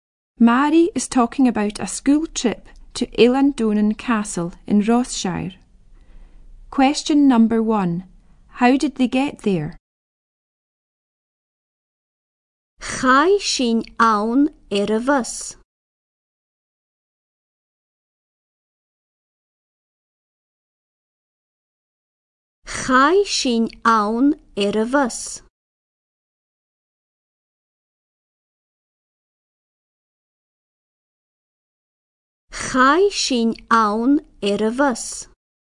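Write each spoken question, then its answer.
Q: How did they get there?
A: By bus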